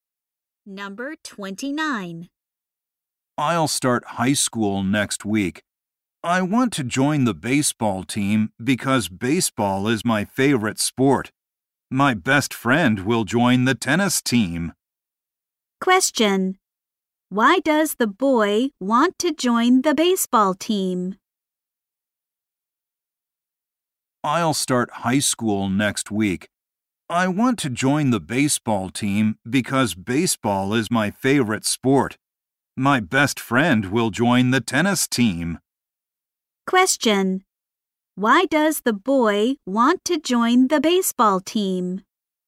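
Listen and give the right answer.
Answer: Baseball is his favorite sport.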